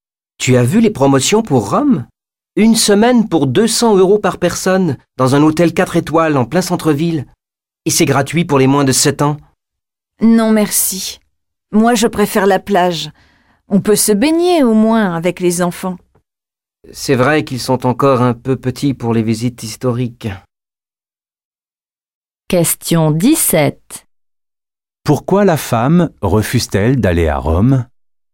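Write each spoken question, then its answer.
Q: Pourquoi la femme refuse-t-elle d'aller à Rome ?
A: Elle préfère la plage, où on peut se baigner avec les enfants.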